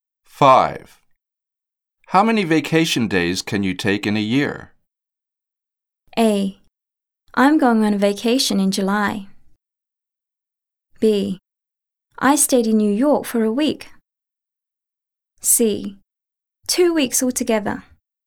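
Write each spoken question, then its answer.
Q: How many vacation days can you take in a year?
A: C: 2 weeks altogether.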